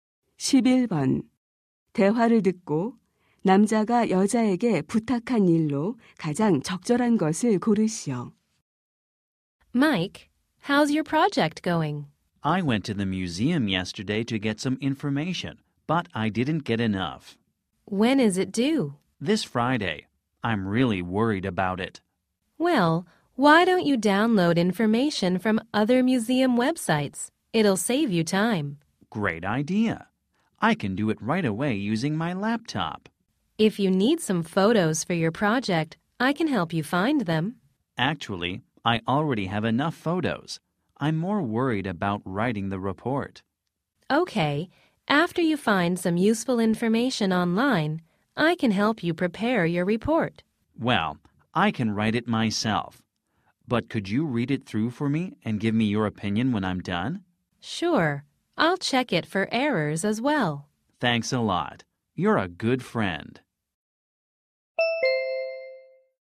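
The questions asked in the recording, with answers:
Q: 대화를 듣고 남자가 여자에게 부탁한 일로 가장 적절한 것을 고르시오.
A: 보고서를 읽고 의견 주기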